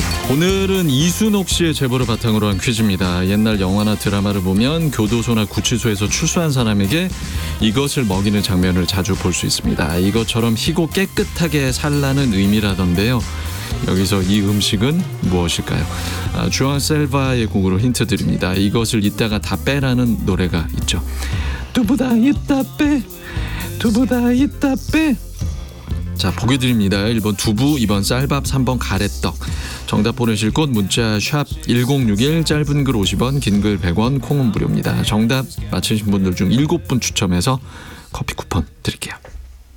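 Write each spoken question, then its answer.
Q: 여기서 이 음식은 무엇일까요?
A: 1번: 두부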